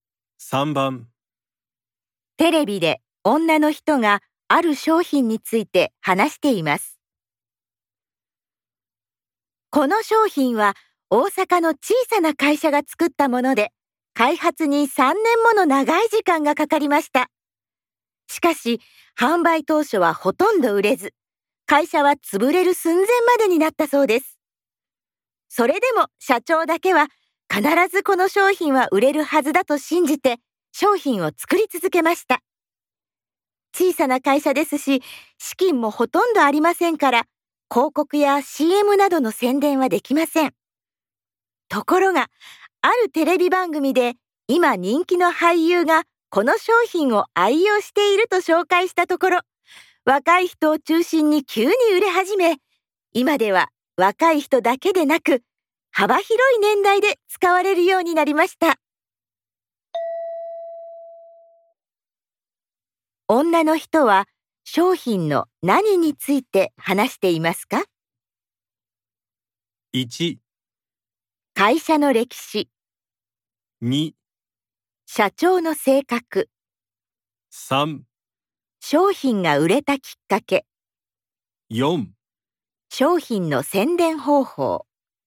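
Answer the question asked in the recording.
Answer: 3: 商品が売れたきっかけ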